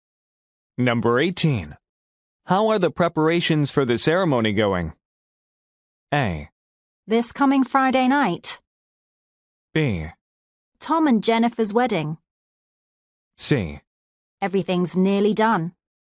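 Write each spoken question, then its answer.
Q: How are the preparations for the ceremony going?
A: C: Everything's nearly done.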